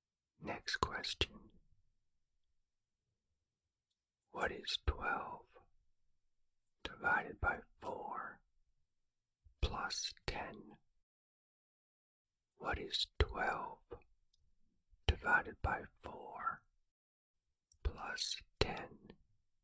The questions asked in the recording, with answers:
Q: What is 12 divided by 4 plus 10?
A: The answer is 13.